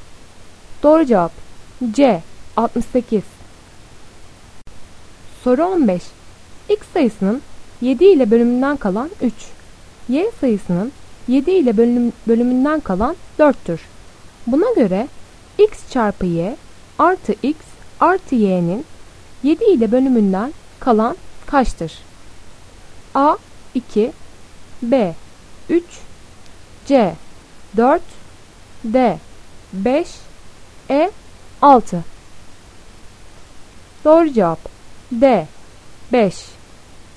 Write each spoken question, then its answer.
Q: Buna göre x çarpı y artı x artı y'nin 7 ile bölümünden kalan kaçtır?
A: Doğru cevap D 5.